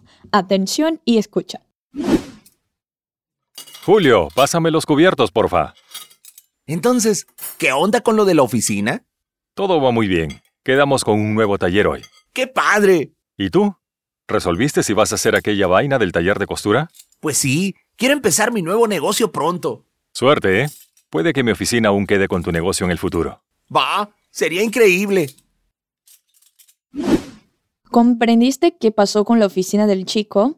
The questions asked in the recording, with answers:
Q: ¿Comprendiste qué pasó con la oficina del chico?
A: todo va muy bien en la oficina y que cerraron un acuerdo con un nuevo taller